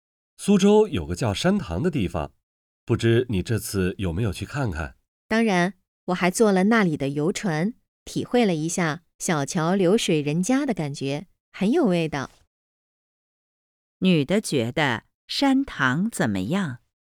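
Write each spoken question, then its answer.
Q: 女的觉得山塘怎么样?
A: 很有味道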